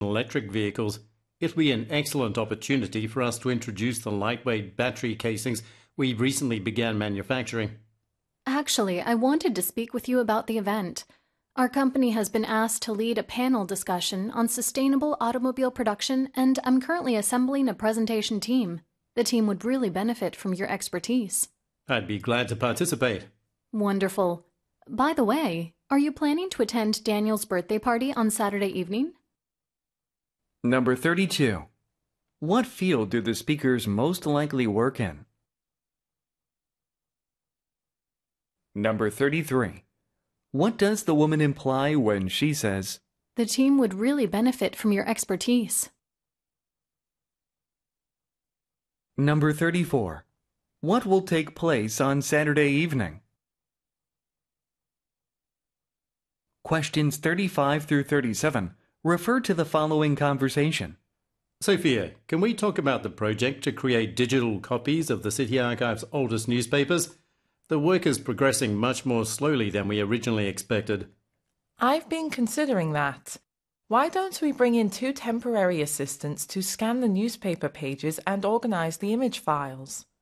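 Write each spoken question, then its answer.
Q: What field do the speakers most likely work in?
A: B번 Automotive Manufacturing. 그래서 이제 B가 32번에 정답이에요.

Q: What does the woman imply when she says, "The team would really benefit from your expertise"?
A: She wants the listener to join the presentation team

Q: What will take place on Saturday evening?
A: Daniel's birthday party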